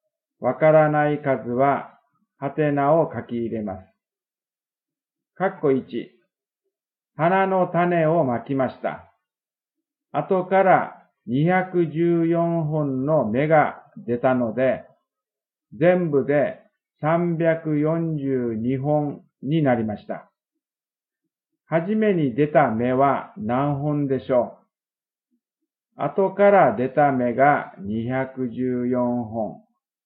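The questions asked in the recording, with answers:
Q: はじめに出た芽は何本でしょう?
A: 128本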